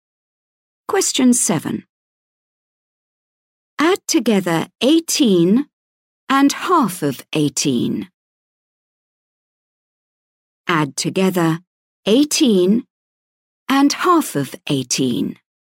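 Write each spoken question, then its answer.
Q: Add together 18 and half of 18.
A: 27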